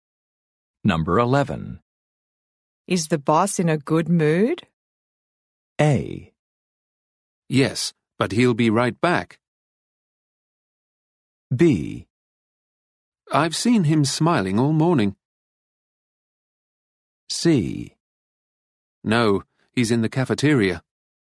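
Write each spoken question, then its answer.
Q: Is the boss in a good mood?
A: B: I've seen him smiling all morning.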